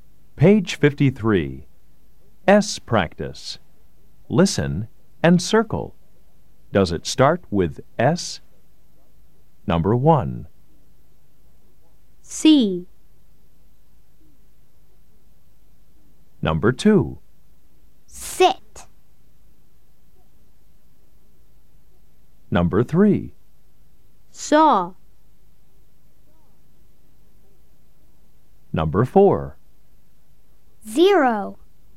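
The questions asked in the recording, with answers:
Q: Does it start with S?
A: Yes

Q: Does it start with S?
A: Yes

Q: Does it start with S?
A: No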